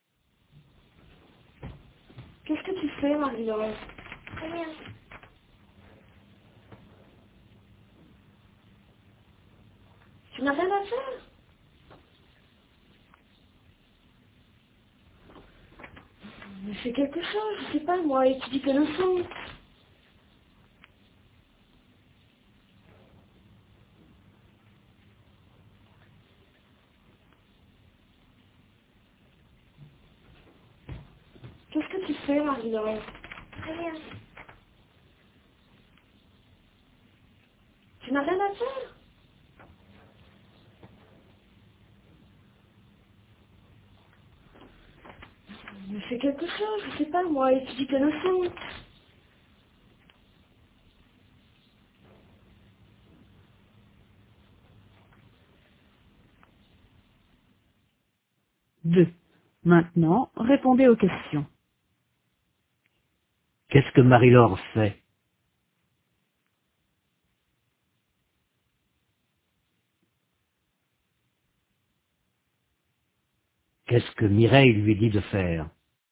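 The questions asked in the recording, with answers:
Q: Qu'est-ce que Mireille lui dit de faire?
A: D'étudier ses leçons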